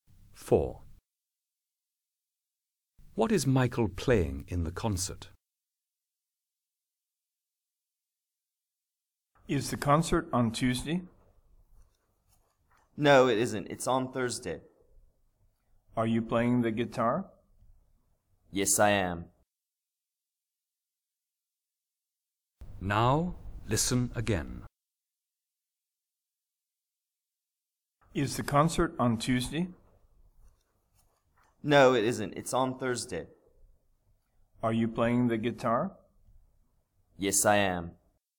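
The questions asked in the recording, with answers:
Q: What is Michael playing in the concert?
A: The guitar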